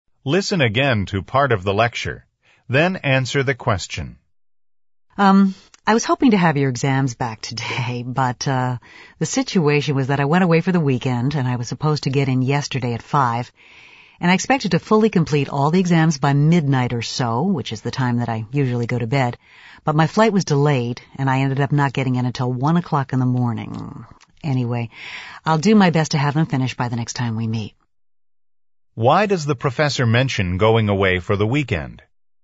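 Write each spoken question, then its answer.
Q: Why does the professor mention going away for the weekend?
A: To explain why he hasn't finished grading the exams: his flight back was delayed.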